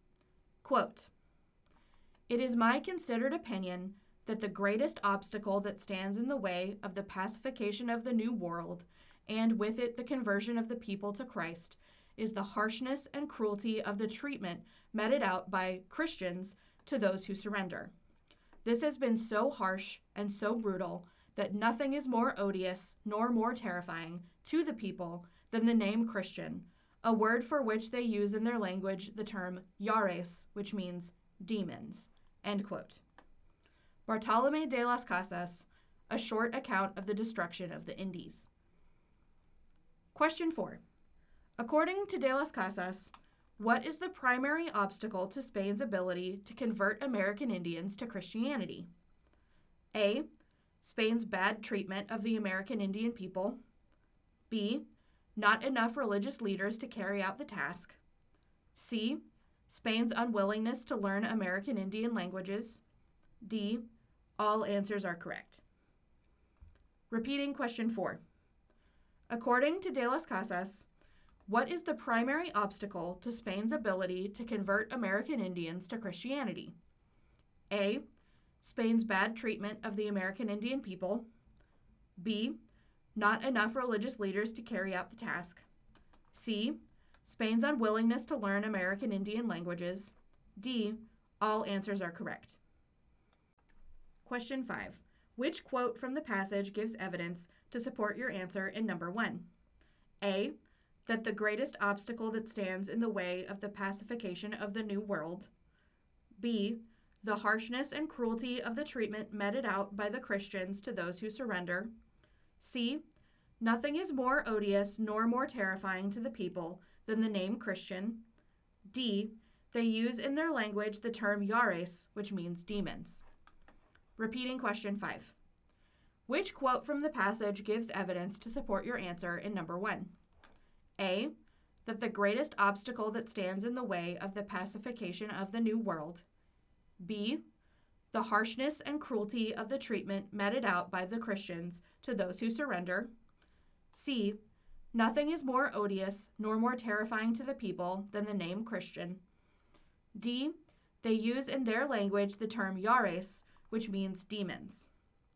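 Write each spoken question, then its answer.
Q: According to de las Casas, what is the primary obstacle to Spain's ability to convert American Indians to Christianity?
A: A: Spain's bad treatment of the American Indian people.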